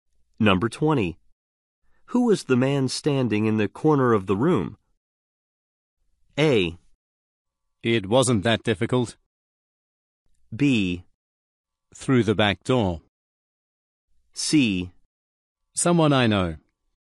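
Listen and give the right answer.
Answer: C: Someone I know.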